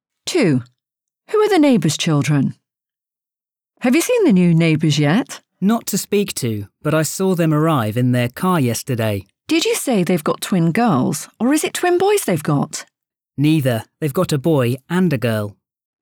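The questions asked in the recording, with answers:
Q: Who are the neighbour's children?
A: A boy and a girl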